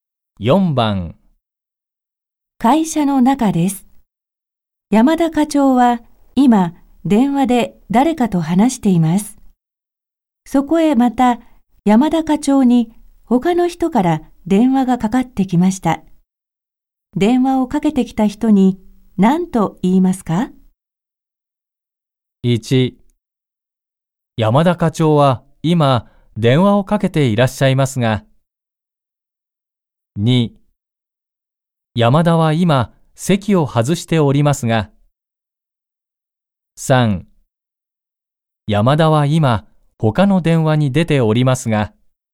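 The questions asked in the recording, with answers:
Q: 電話をかけてきた人に何と言いますか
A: 3: 山田は今他の電話に出ておりますが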